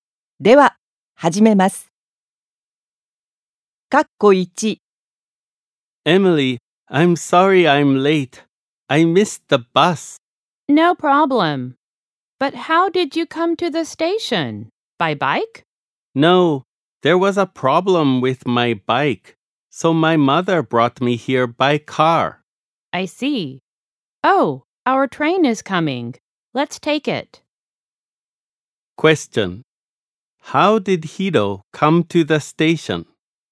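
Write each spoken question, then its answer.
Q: How did Hiro come to the station?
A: By car (his mother brought him)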